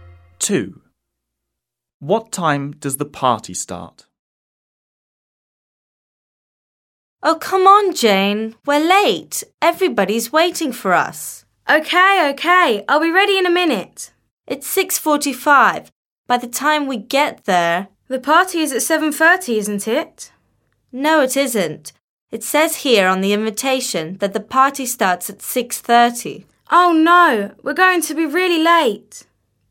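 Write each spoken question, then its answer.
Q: What time does the party start?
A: 6:30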